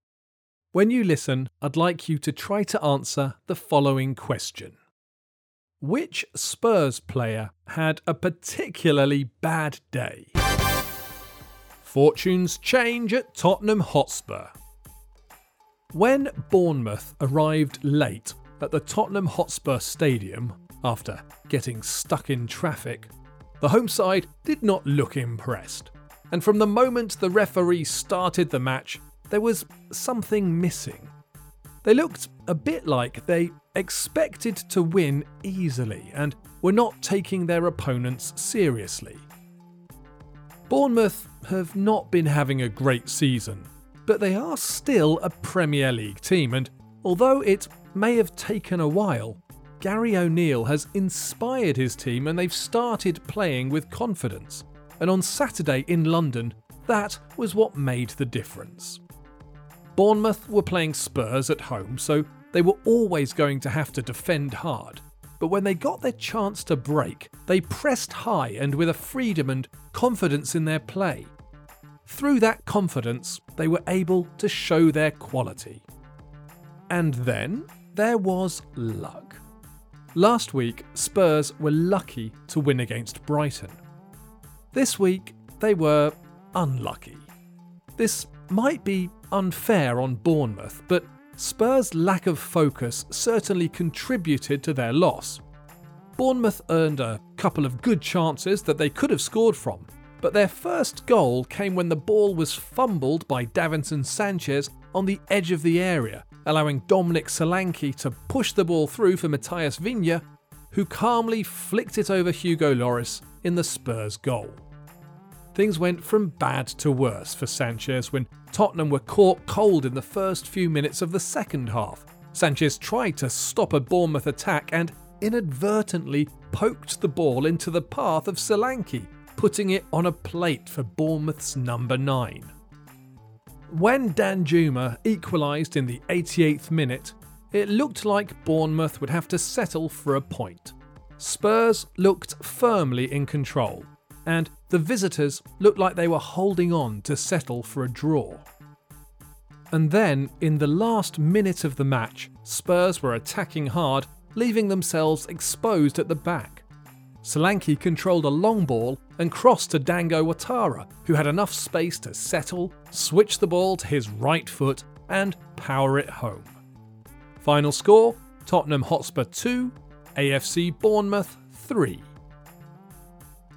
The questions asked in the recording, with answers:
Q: Which Spurs player had a particularly bad day?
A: The answer is Davinson Sanchez.